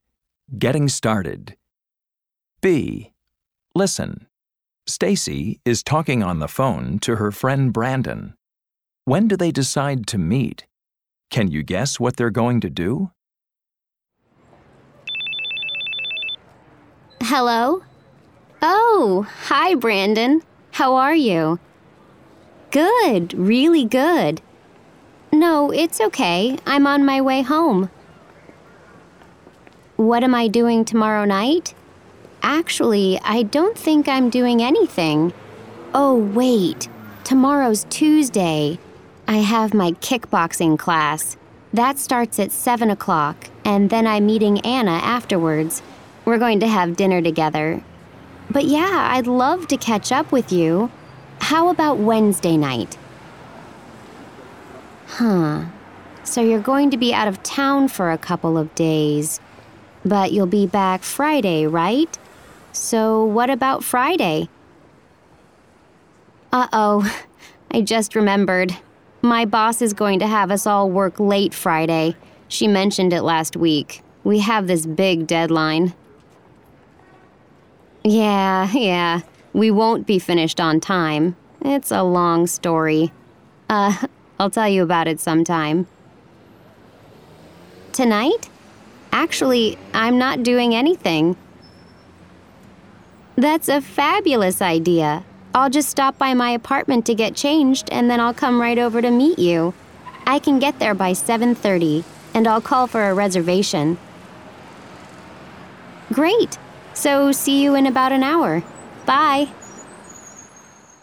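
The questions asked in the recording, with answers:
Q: When do they decide to meet?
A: Tonight, at about 7:30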